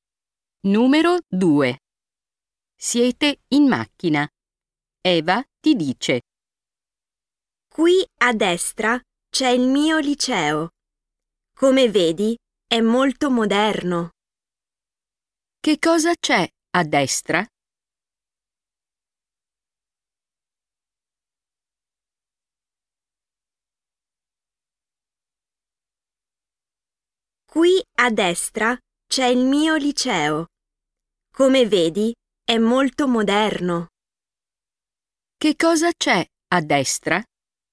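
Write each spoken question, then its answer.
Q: Che cosa c'è a destra?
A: Il liceo di Eva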